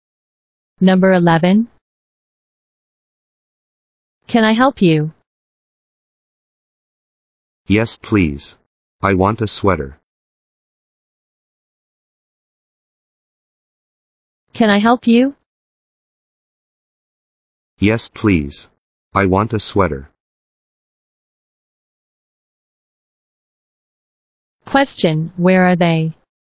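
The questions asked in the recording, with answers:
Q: Question, where are they?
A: In a store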